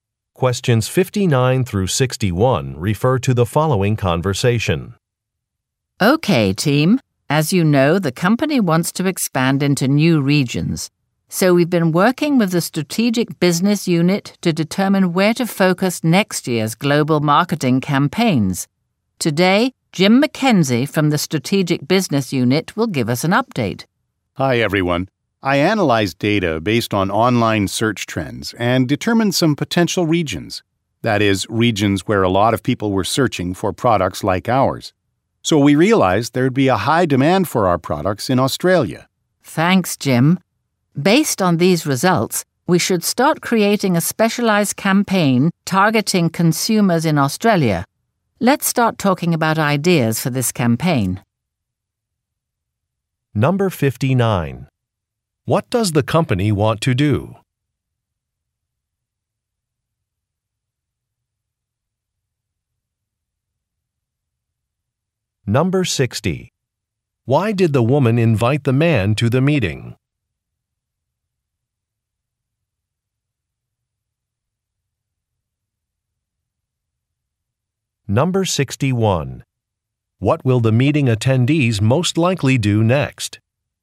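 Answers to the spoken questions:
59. Expand into new regions
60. To give an update on his data analysis
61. Discuss ideas for the Australia campaign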